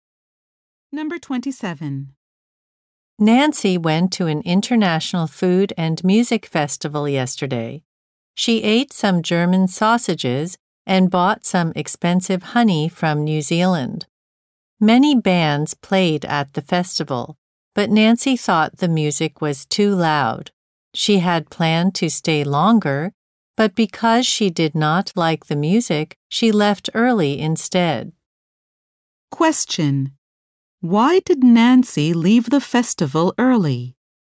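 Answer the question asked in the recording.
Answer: She did not like the music because it was too loud.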